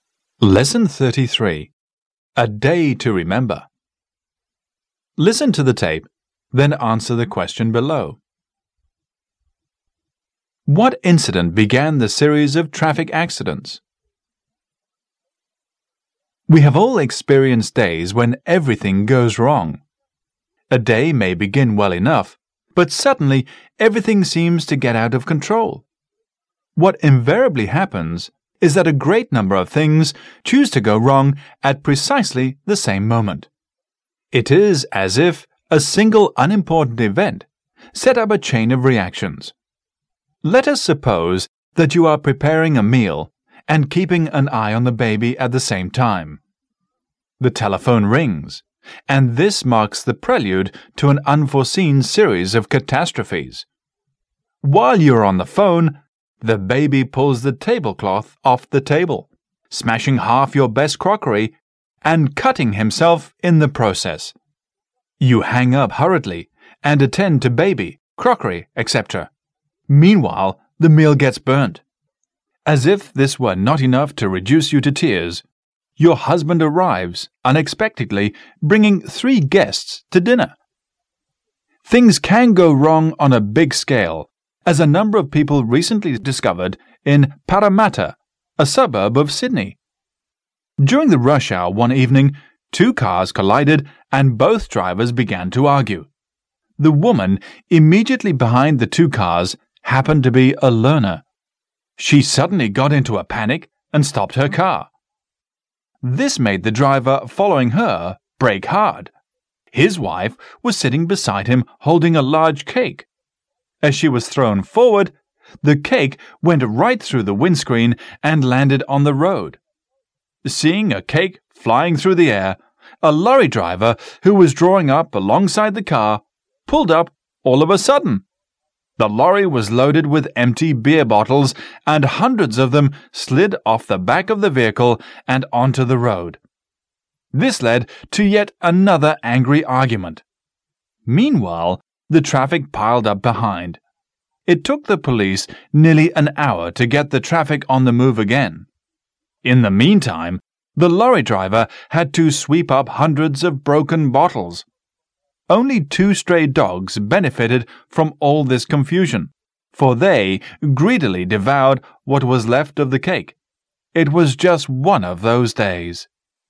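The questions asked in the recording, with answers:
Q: What incident began the series of traffic accidents?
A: Two cars collided during the rush hour and both drivers began to argue.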